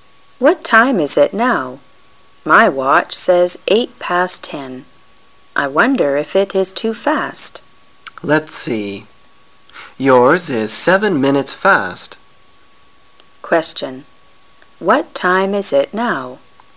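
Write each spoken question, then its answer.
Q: What time is it now?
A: 1 minute past 10 (10:01)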